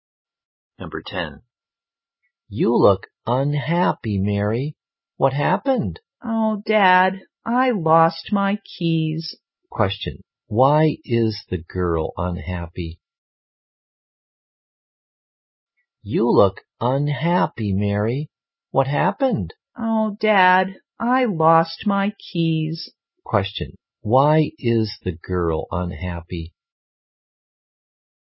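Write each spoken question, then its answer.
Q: Question, why is the girl unhappy?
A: She lost her keys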